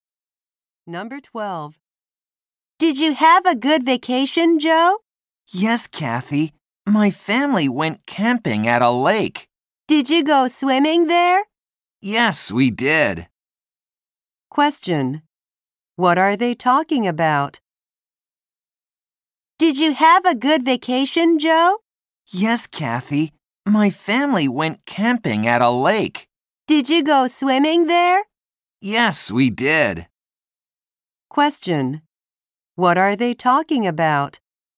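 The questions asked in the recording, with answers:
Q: What are they talking about?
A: Joe's vacation (camping at a lake)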